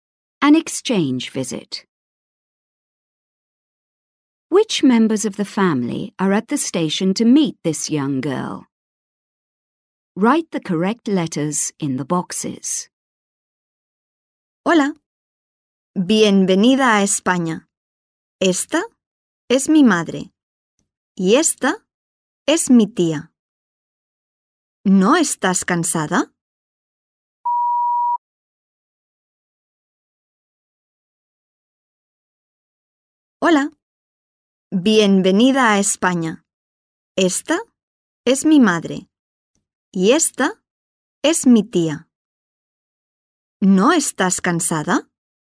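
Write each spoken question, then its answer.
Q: Which members of the family are at the station to meet this young girl?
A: Her mother and her aunt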